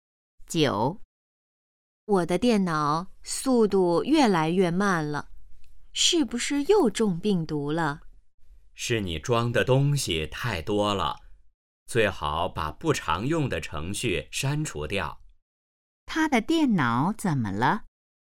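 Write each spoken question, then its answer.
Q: 他的电脑怎么了?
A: 速度越来越慢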